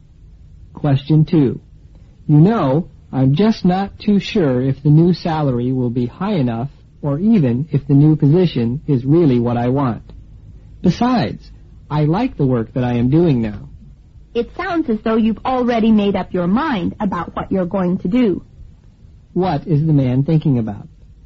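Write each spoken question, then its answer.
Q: What is the man thinking about?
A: Whether to take a new job or position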